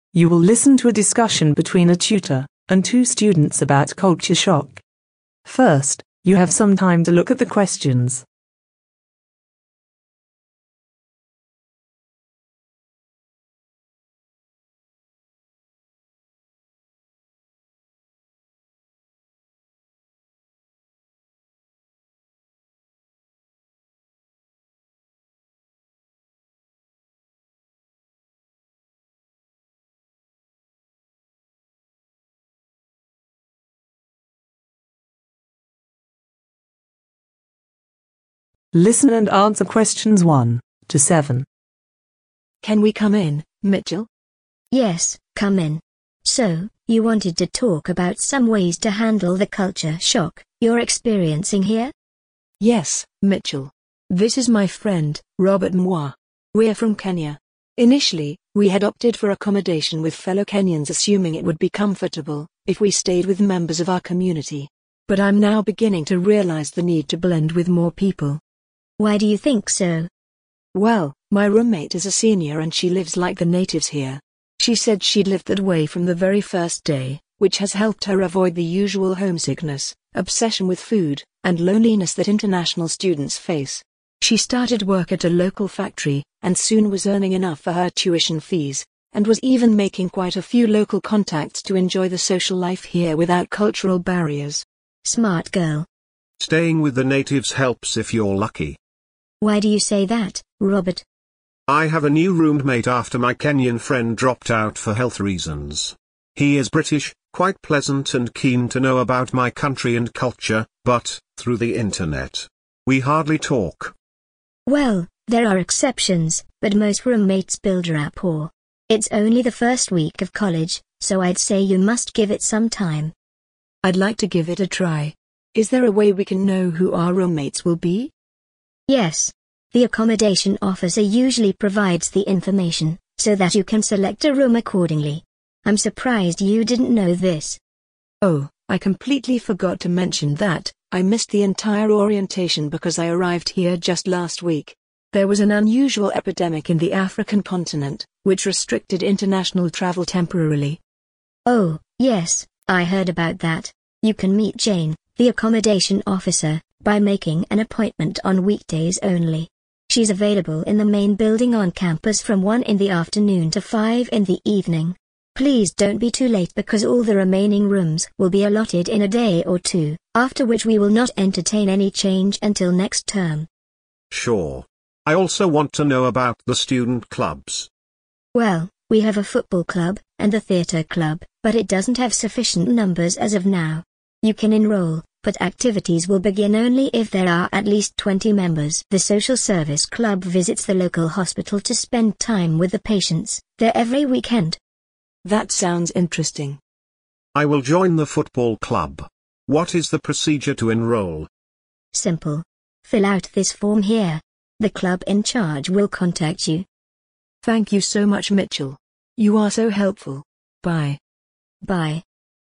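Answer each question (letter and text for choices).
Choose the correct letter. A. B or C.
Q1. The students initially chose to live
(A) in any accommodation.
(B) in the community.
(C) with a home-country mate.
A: (C) with a home-country mate.

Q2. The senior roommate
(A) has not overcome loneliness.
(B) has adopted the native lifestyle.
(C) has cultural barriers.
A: (B) has adopted the native lifestyle.

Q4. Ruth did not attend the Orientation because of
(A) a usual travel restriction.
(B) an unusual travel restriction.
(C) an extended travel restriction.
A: (B) an unusual travel restriction.

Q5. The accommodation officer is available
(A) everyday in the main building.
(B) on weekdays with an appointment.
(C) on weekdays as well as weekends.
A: (B) on weekdays with an appointment.

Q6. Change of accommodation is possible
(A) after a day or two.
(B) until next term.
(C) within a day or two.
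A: (C) within a day or two.

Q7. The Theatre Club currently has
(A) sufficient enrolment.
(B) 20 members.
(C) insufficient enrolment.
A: (C) insufficient enrolment.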